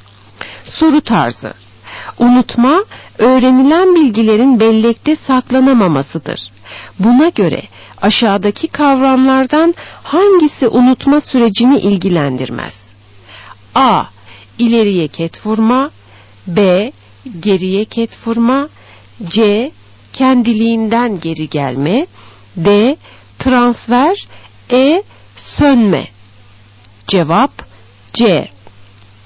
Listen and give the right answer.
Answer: Cevap C.